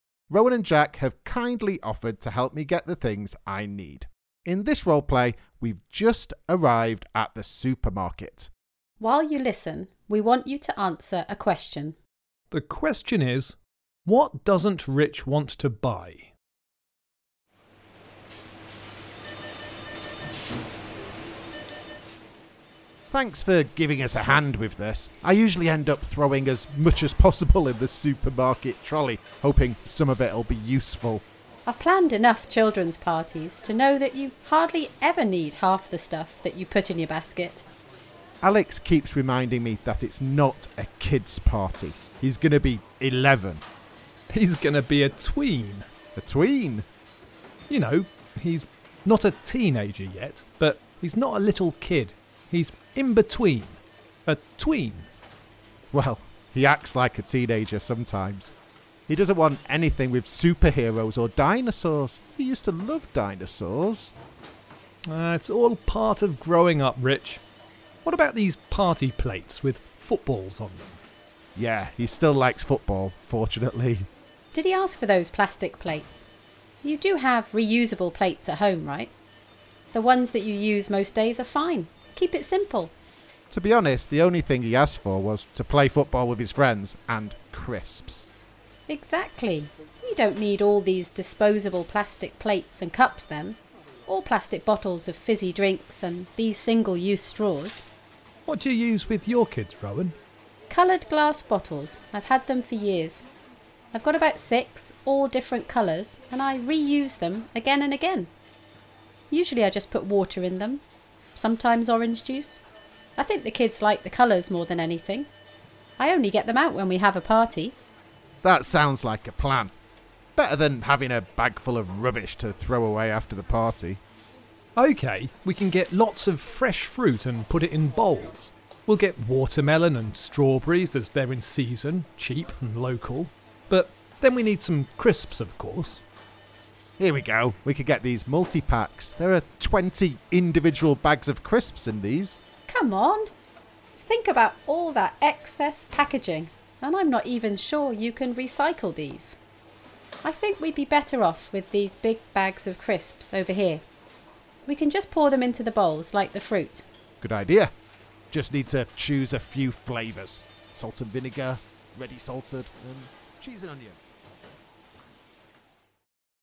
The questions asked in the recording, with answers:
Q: The question is, what doesn't Rich want to buy?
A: Well, I decided not to buy lots of things. Things like plastic cups and plates, single-use straws, and anything with too much packaging.